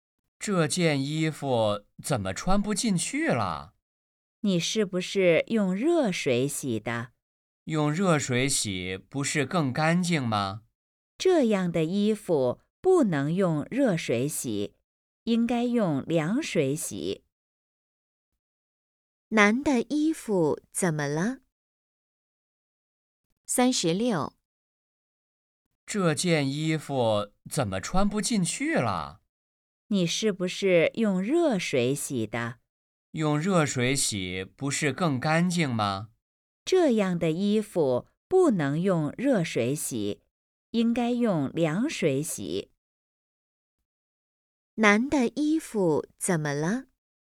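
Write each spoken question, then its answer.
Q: 男的衣服怎么了?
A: 变小了,穿不进去了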